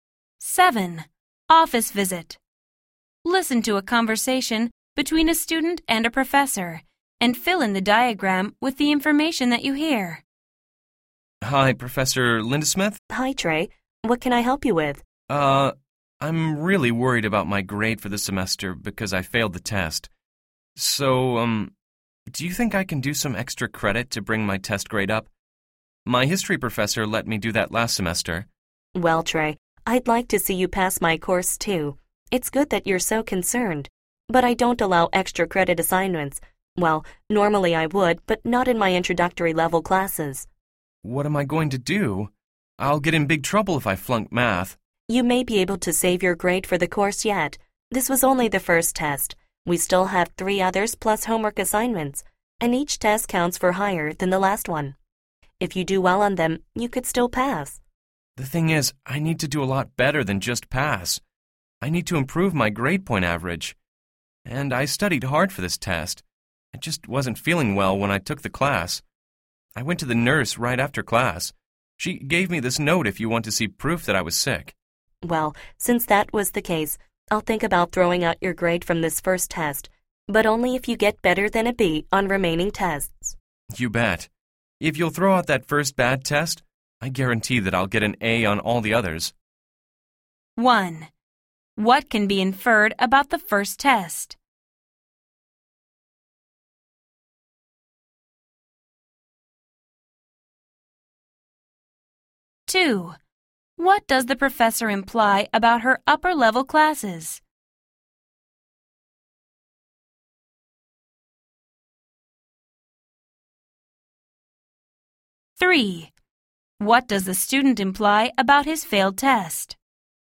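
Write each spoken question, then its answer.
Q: What does the professor imply about her upper-level classes?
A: She allows extra credit assignments in them

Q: What does the student imply about his failed test?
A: He failed because he was sick when he took it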